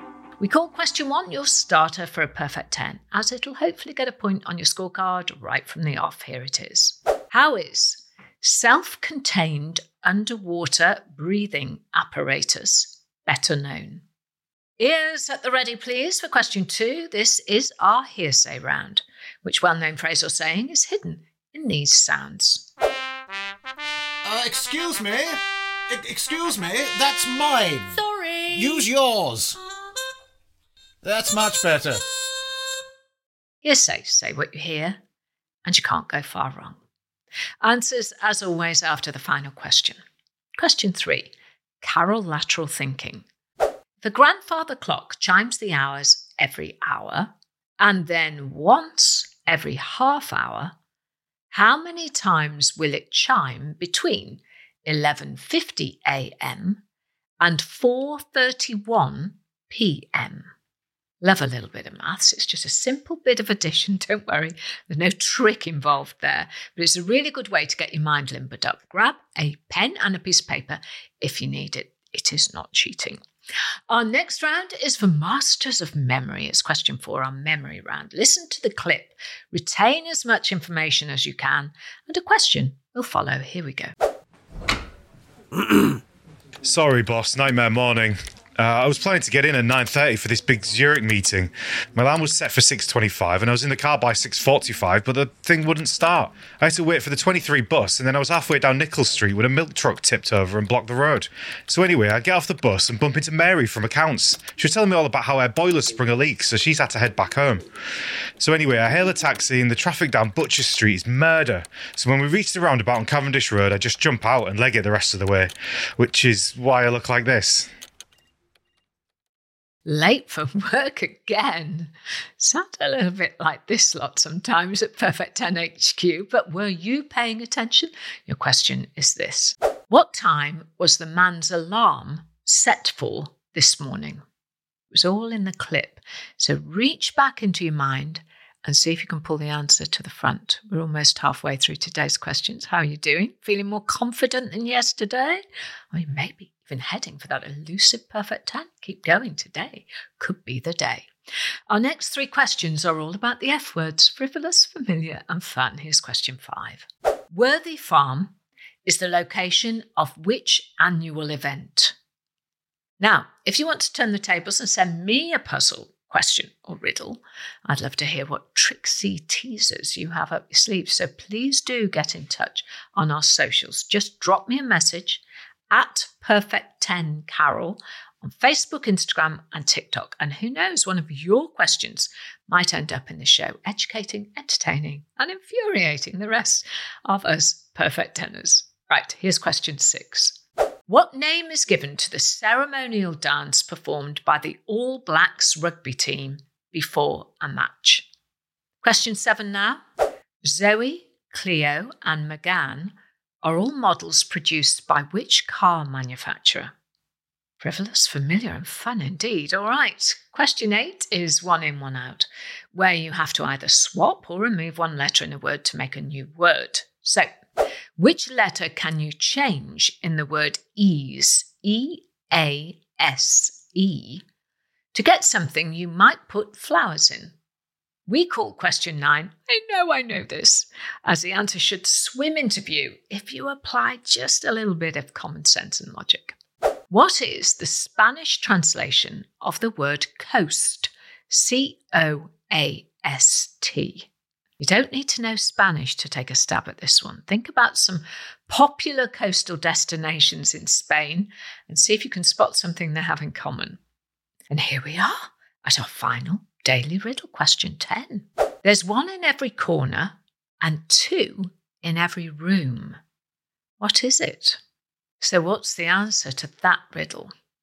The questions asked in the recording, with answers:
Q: How many times will it chime between 11:50 a.m. and 4:31 p.m.?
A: And the answer is 27 times.

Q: What time was the man's alarm set for this morning?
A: The answer was 6:25 a.m.